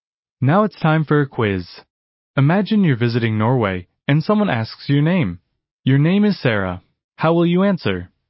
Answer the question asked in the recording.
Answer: Jeg heter Sara.